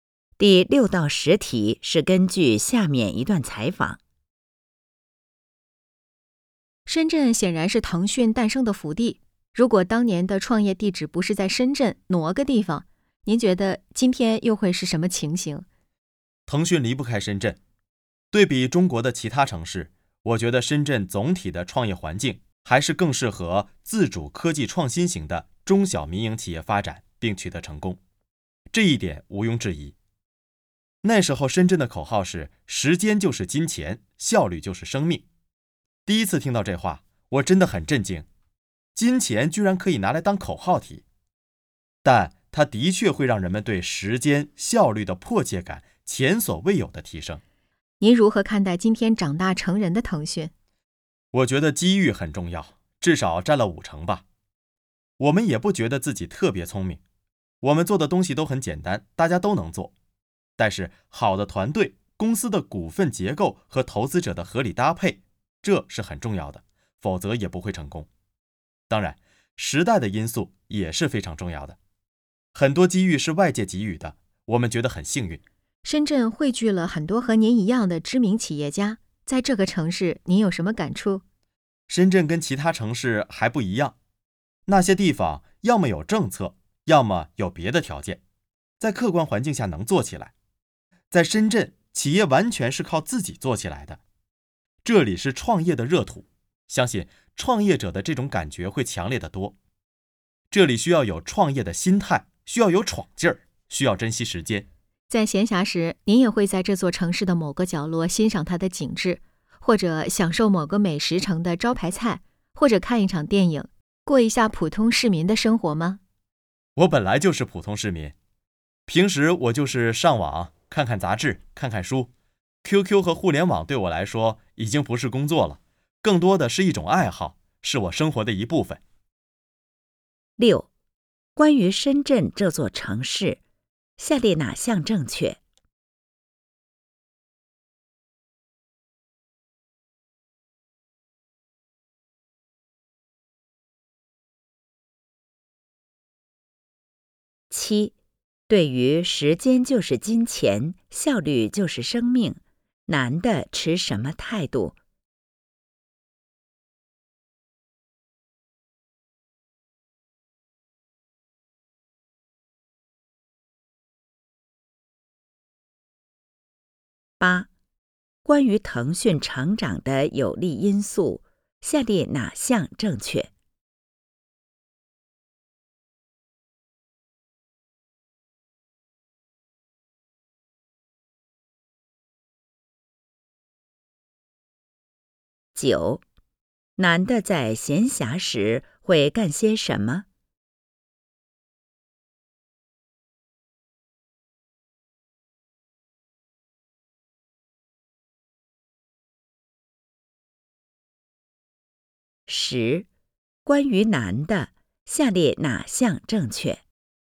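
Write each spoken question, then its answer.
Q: 男的在闲暇时会干些什么?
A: 上网,看杂志,看书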